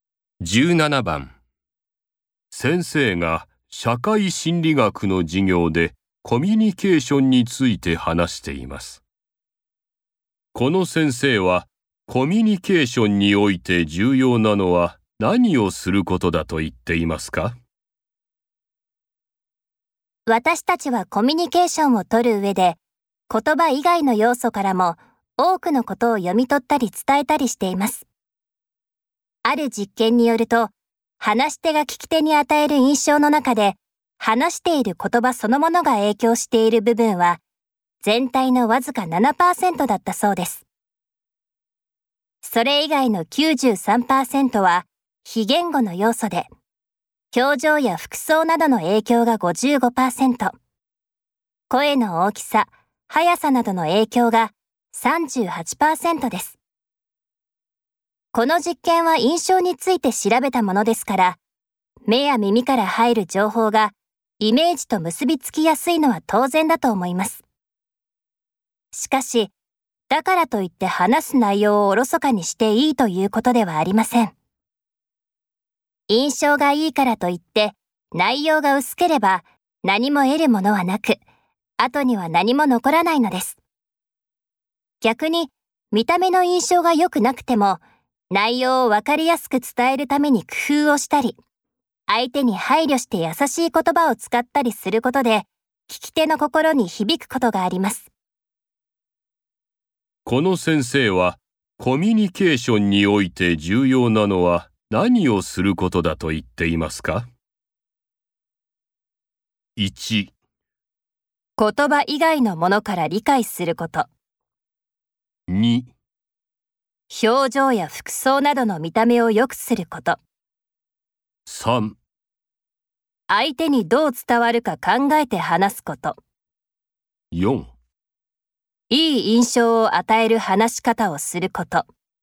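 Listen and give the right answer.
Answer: 3: 相手にどう伝わるか考えて話すこと。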